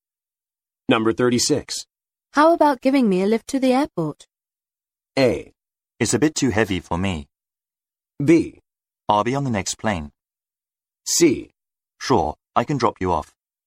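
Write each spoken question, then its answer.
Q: How about giving me a lift to the airport?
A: C: Sure, I can drop you off.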